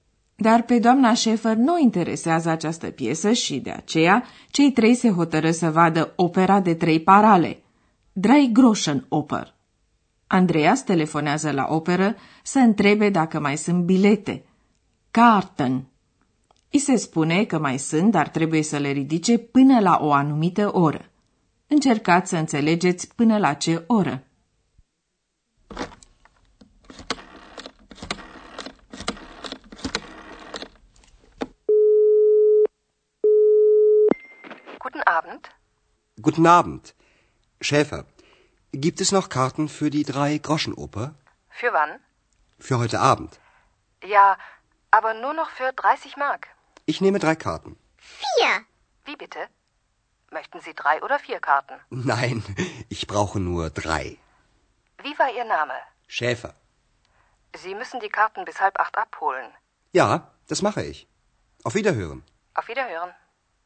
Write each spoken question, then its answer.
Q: Încercați să înțelegeți până la ce oră.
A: Așadar, Andreas trebuie să ridice biletele până la șapte și jumătate.